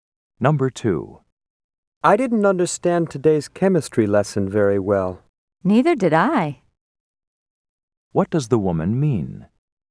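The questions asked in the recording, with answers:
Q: What does the woman mean?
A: She didn't understand the chemistry lesson either.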